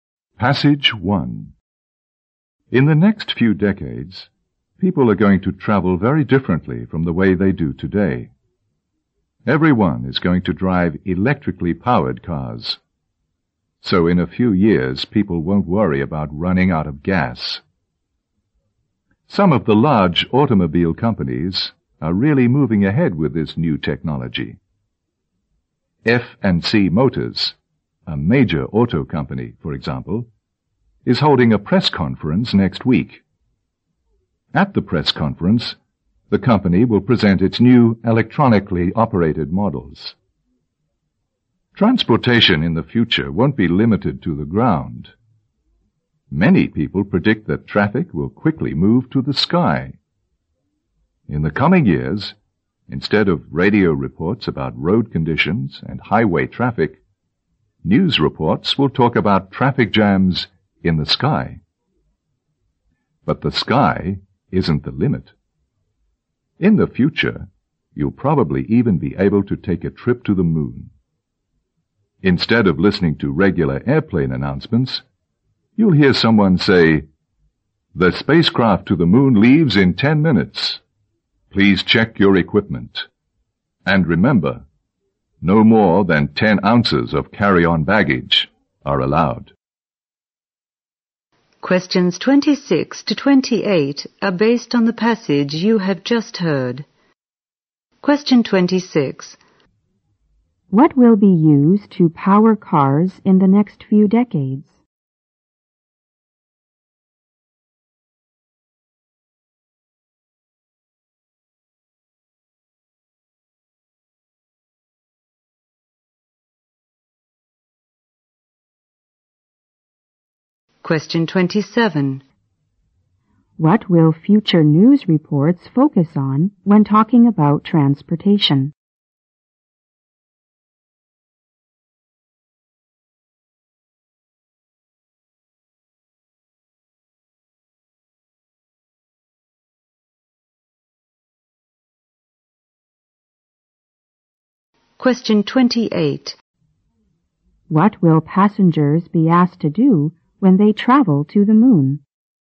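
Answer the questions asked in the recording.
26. Electricity
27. Traffic jams in the sky
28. Check their equipment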